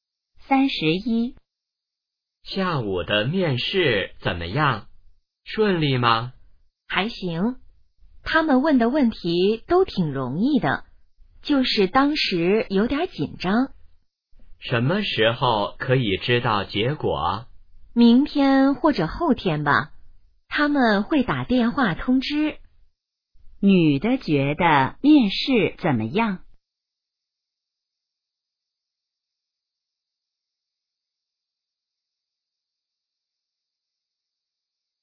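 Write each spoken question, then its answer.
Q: 女的觉得面试怎么样?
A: 问题挺容易,但有点紧张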